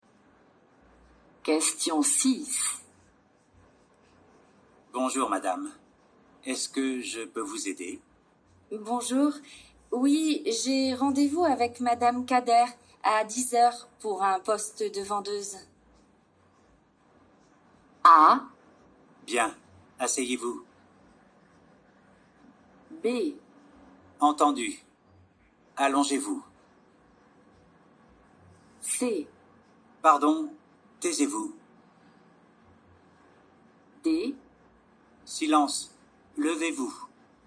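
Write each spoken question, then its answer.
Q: Bonjour, oui, j'ai rendez-vous avec madame Kader à 10h pour un poste de vendeuse.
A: A: Bien, asseyez-vous.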